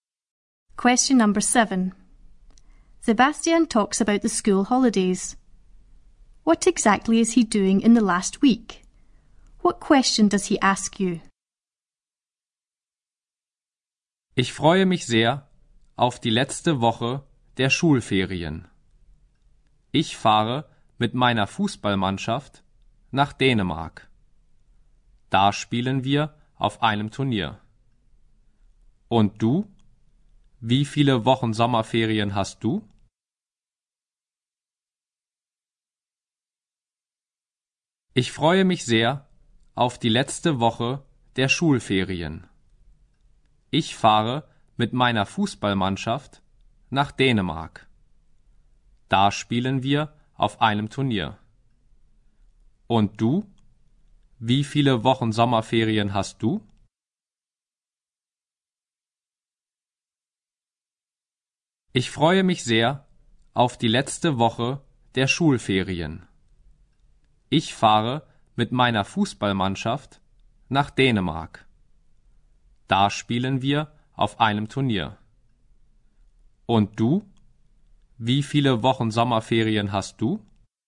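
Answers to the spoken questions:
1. Going to Denmark with his football team to play in a tournament
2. How many weeks of summer holidays you have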